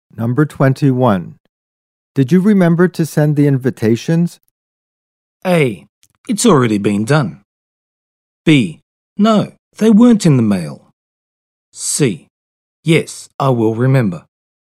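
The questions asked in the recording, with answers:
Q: Did you remember to send the invitations?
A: A: It's already been done.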